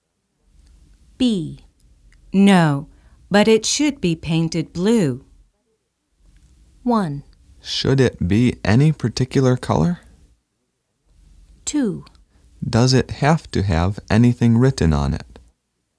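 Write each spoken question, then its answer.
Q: No, but it should be painted blue.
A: 2: Does it have to have anything written on it?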